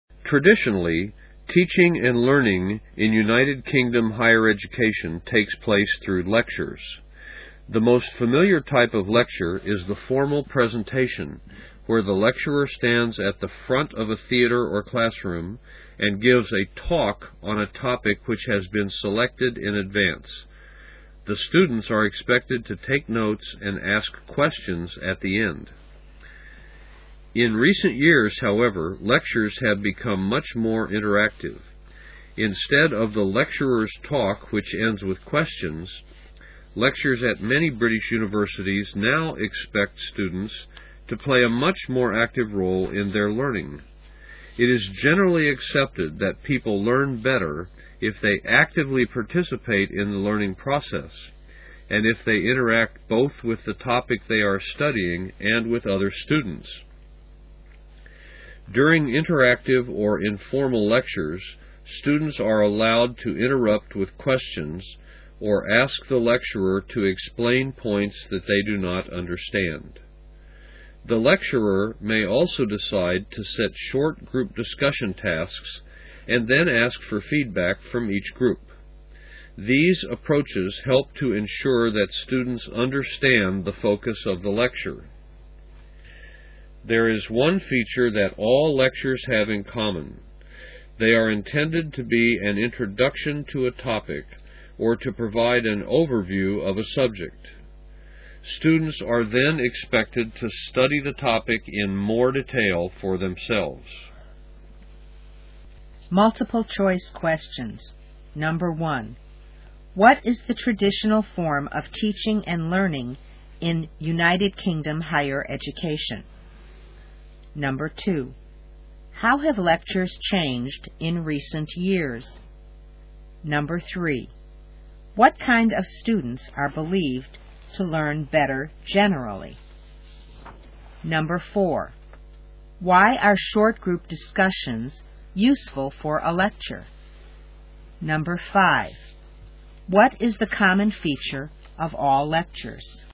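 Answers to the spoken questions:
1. Lectures
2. They have become much more interactive
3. Those who actively participate and interact with the topic and other students
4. They help ensure students understand the focus of the lecture
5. They are an introduction to a topic or an overview of a subject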